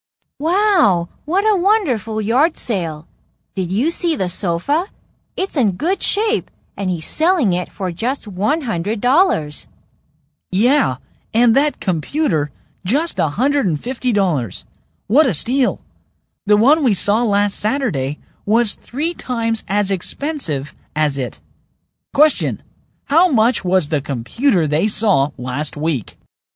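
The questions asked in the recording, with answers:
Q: Question, how much was the computer they saw last week?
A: $450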